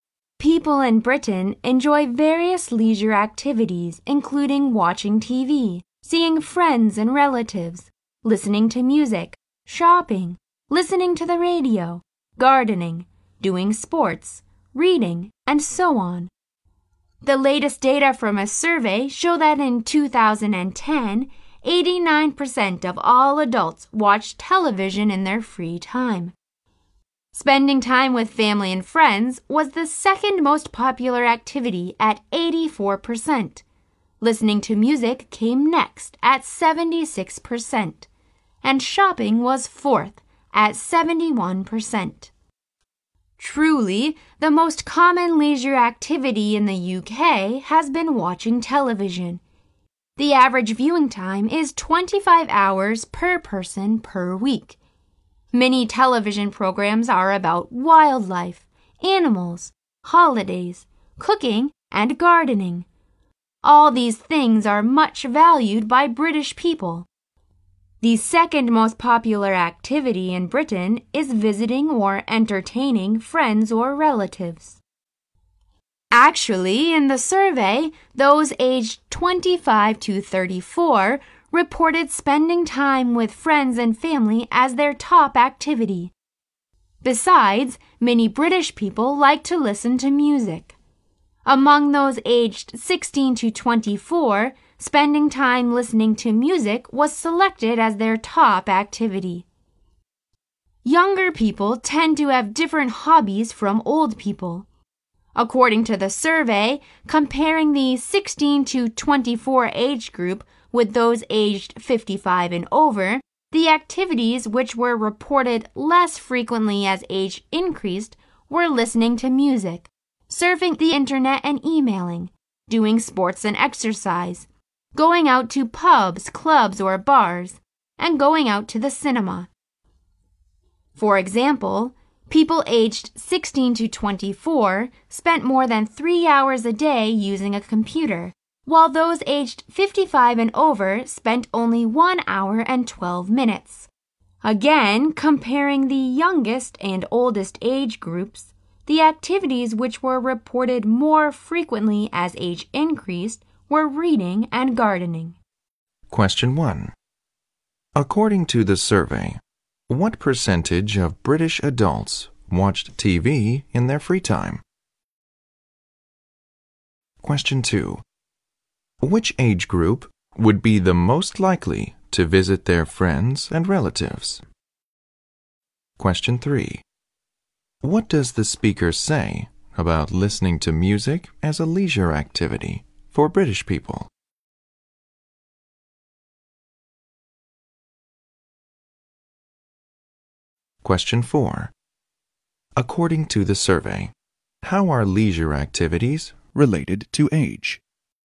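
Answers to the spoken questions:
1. 89%
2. Those aged 25 to 34.
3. It is the top activity for people aged 16 to 24.
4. Music, internet, sports and going out become less frequent with age; reading and gardening become more frequent.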